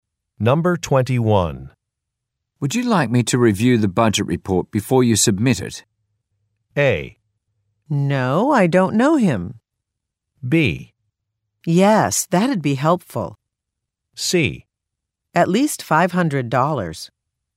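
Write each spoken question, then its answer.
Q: Would you like me to review the budget report before you submit it?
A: B: Yes, that'd be helpful.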